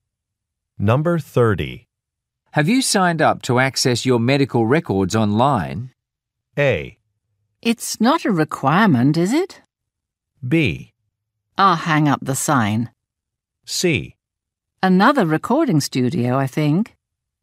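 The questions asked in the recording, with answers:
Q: Have you signed up to access your medical records online?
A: A: It's not a requirement, is it?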